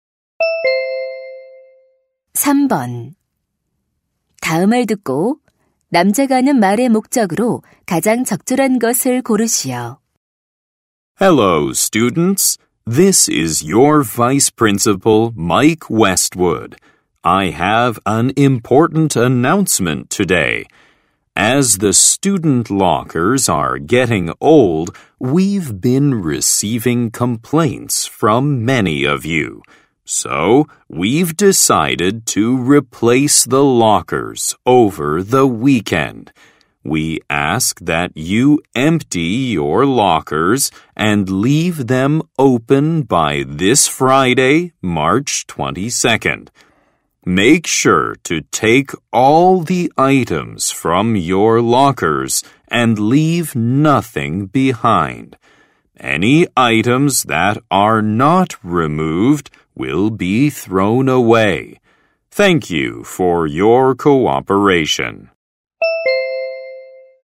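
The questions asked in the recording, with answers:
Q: 다음을 듣고 남자가 하는 말의 목적으로 가장 적절한 것을 고르시오.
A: 사물함 교체를 위해 사물함을 비워 달라고 요청하려고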